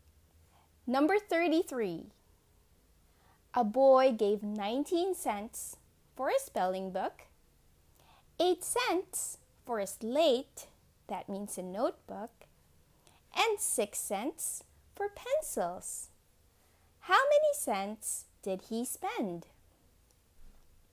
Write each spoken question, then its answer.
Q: How many cents did he spend?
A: The answer is, he spent 33 cents in all.